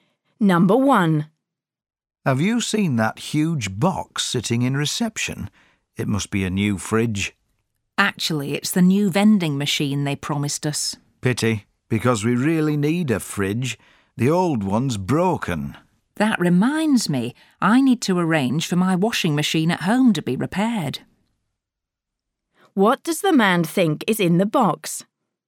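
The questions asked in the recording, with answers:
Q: What does the man think is in the box?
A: a new fridge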